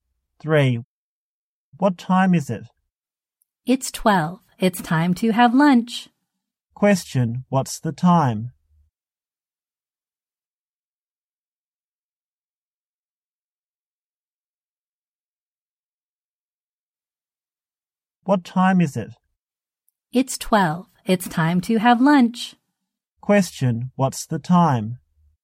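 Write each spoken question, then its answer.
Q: What's the time?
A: 12 o'clock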